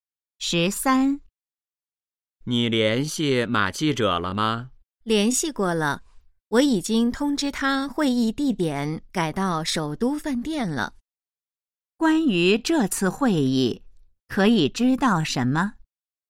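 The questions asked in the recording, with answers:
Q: 关于这次会议,可以知道什么?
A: 会议地点改到首都饭店了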